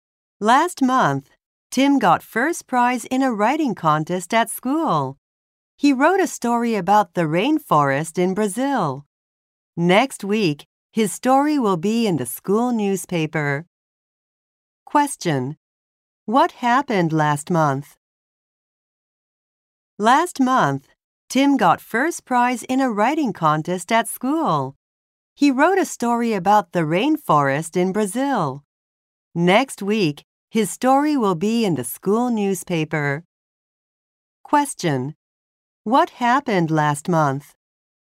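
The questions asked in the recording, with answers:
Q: What happened last month?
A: Tim won first prize in a writing contest.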